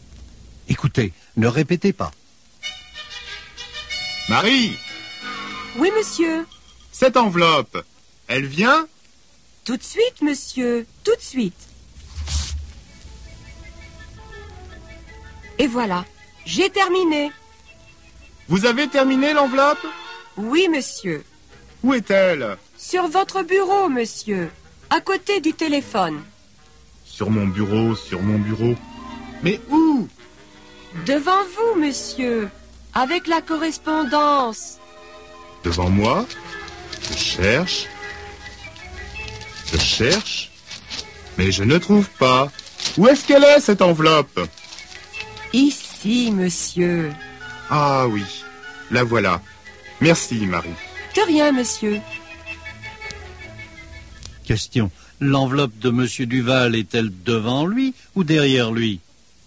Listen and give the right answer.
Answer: Elle est devant lui.